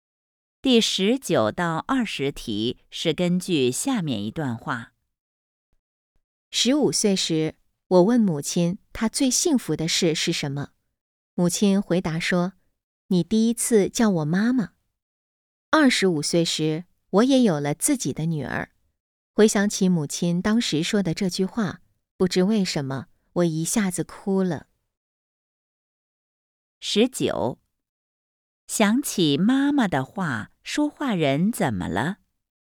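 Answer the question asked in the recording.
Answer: 哭了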